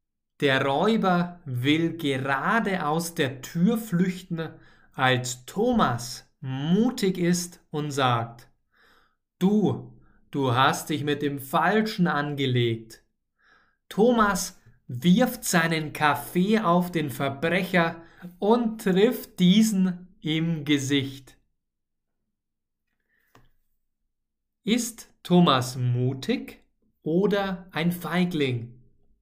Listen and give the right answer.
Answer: Mutig. Thomas ist mutig.